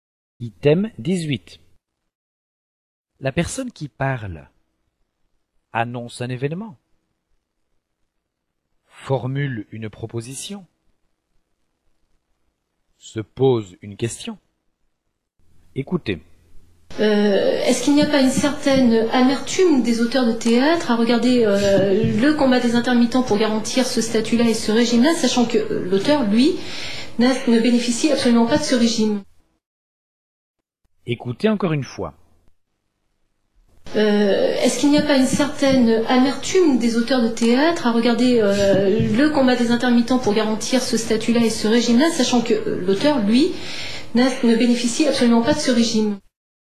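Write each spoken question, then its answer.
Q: La personne qui parle annonce un événement, formule une proposition, se pose une question.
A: se pose une question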